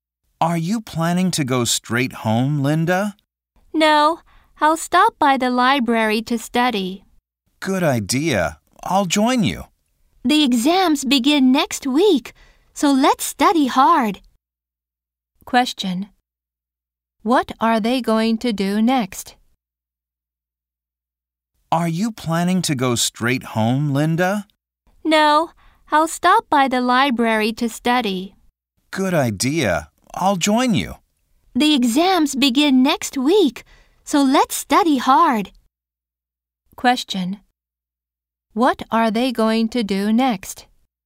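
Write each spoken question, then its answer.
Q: What are they going to do next?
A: Study at the library.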